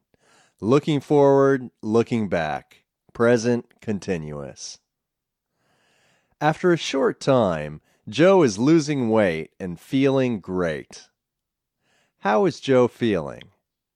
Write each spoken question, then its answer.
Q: How is Joe feeling?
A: Joe is feeling great.